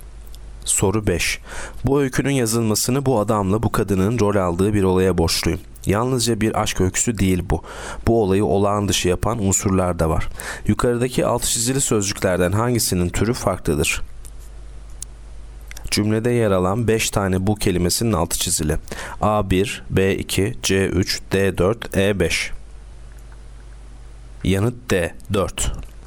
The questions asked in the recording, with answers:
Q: Yukarıdaki altı çizili sözcüklerden hangisinin türü farklıdır?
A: Yanıt D4.